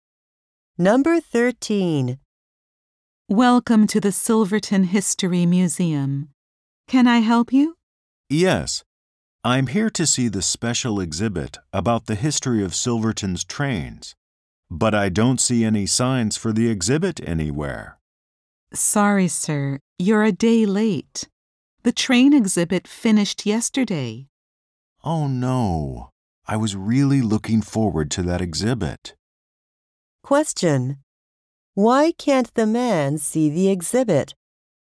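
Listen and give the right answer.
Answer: The exhibit finished yesterday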